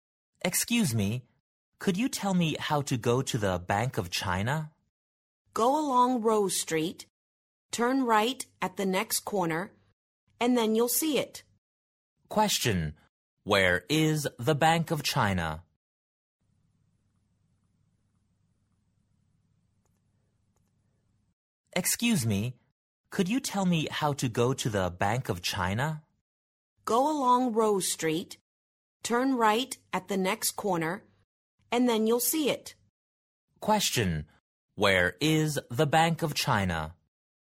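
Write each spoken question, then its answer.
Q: Where is the Bank of China?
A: Along Rose Street, right at the next corner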